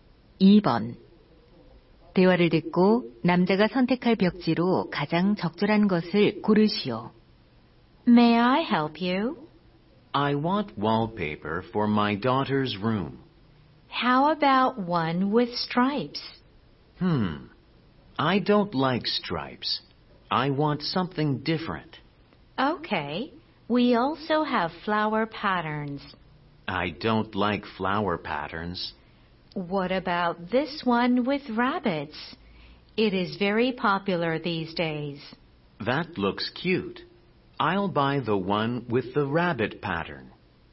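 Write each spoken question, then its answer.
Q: 대화를 듣고 남자가 선택할 벽지로 가장 적절한 것을 고르시오.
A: 토끼 무늬 벽지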